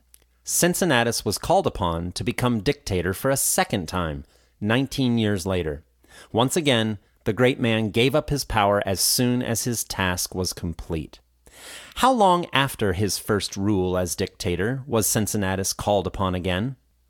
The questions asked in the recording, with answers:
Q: How long after his first rule as dictator was Cincinnatus called upon again?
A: Cincinnatus was called upon to become dictator for a second time 19 years later.